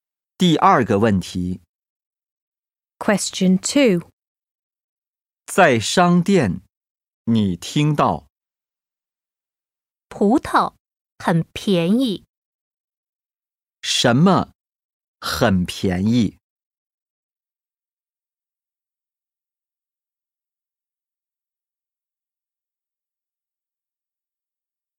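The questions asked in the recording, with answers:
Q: 什么很便宜?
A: 葡萄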